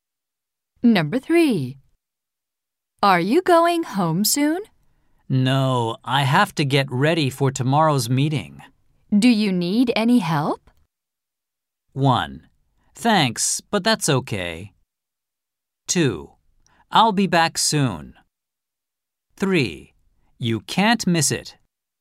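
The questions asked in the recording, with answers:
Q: Do you need any help?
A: 1: Thanks, but that's okay.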